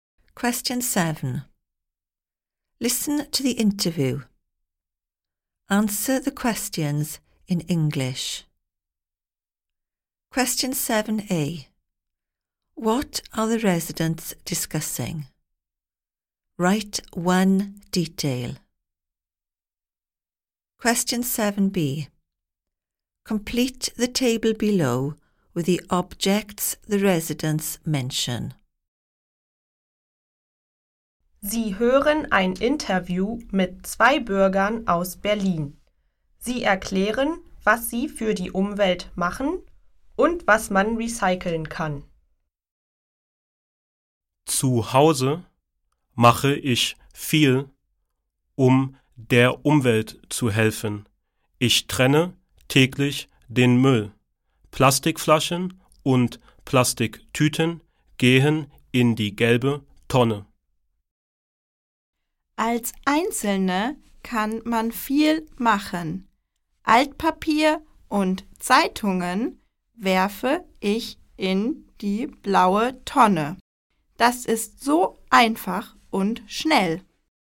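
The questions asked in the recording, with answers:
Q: What are the residents discussing?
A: What they do for the environment / recycling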